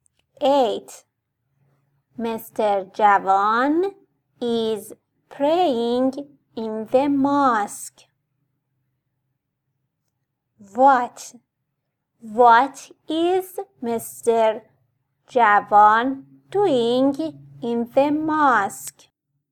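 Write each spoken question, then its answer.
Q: What is Mr. Javan doing in the mosque?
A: praying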